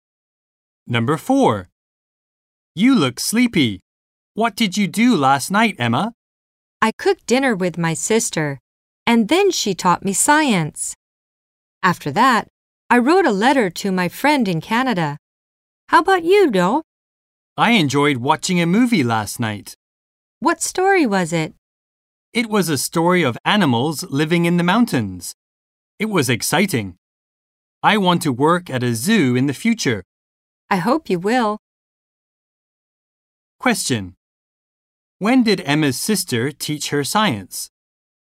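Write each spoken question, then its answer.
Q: When did Emma's sister teach her science?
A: Last night, after they cooked dinner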